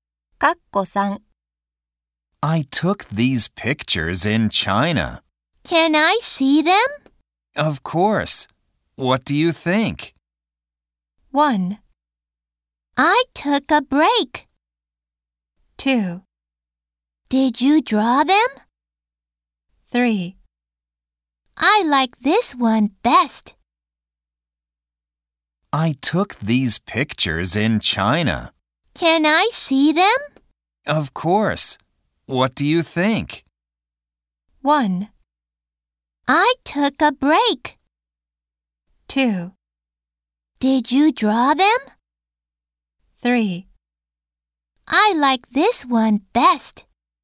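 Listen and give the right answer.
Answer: 3: I like this one best.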